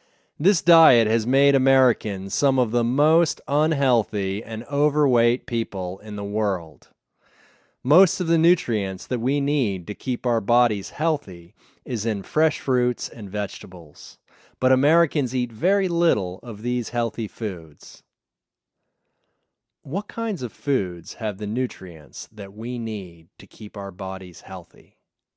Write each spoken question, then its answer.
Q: What kinds of foods have the nutrients that we need to keep our bodies healthy?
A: Fresh fruits and vegetables have the nutrients we need to keep our bodies healthy.